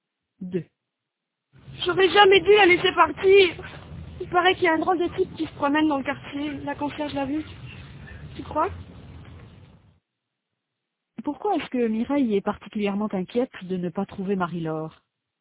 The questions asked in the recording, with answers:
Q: Pourquoi est-ce que Mireille est particulièrement inquiète de ne pas trouver Marie-Laure?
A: Parce qu'il paraît qu'il y a un drôle de type qui se promène dans le quartier.